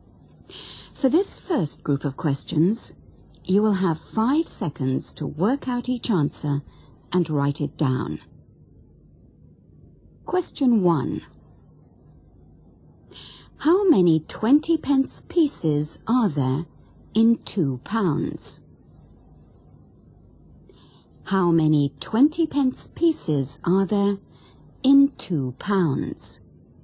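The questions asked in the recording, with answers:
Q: How many 20 pence pieces are there in 2 pounds?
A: 10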